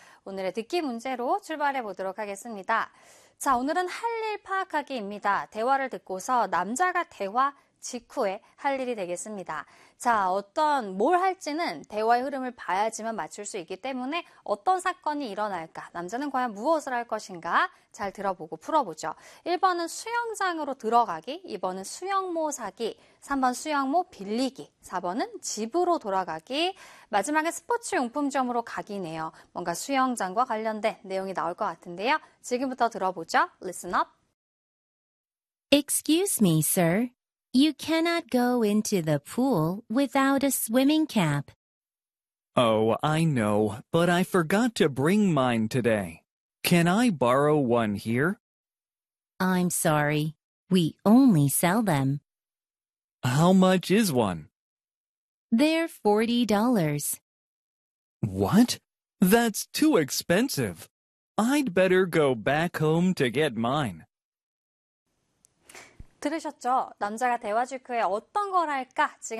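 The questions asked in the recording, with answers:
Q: 대화를 듣고서 남자가 대화 직후에 할 일이 되겠습니다.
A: 4: 집으로 돌아가기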